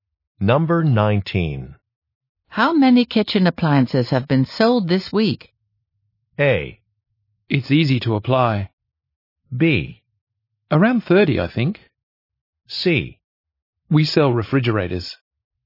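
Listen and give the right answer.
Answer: B: Around 30, I think.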